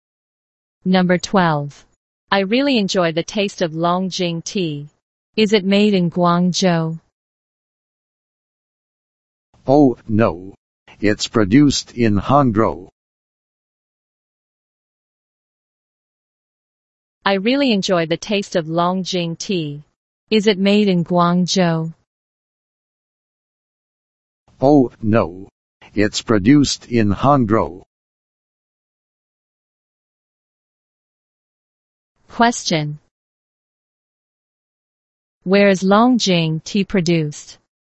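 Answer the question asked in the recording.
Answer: In Hangzhou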